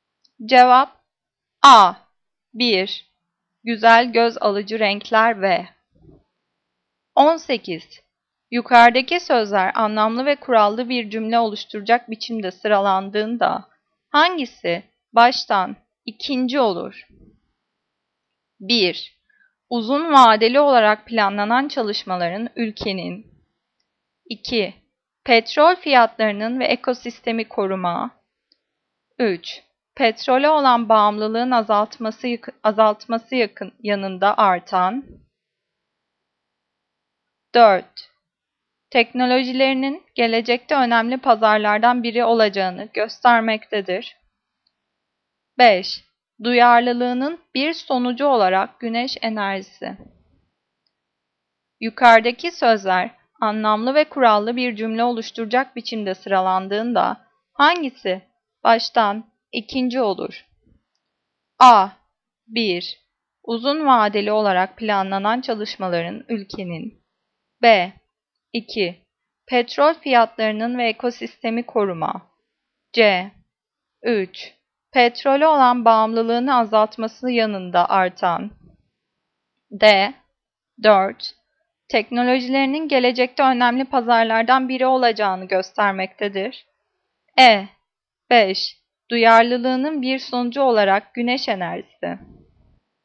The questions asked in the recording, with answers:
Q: Yukarıdaki sözler anlamlı ve kurallı bir cümle oluşturacak biçimde sıralandığında hangisi baştan ikinci olur?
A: Cevap C. 3. Petrole olan bağımlılığını azaltması yanında artan.